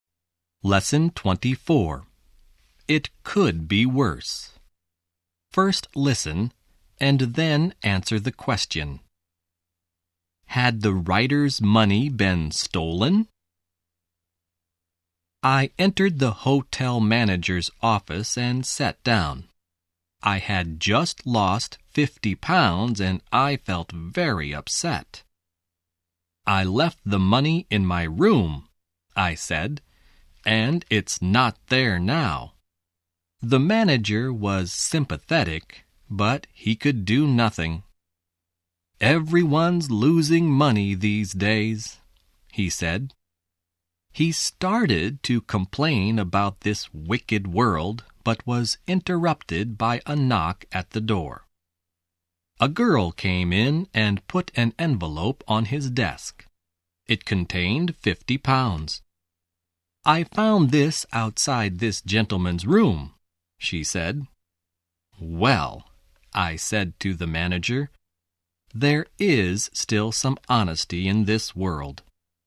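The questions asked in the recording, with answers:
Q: Had the writer's money been stolen?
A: No, it hadn't. A girl found it outside his room.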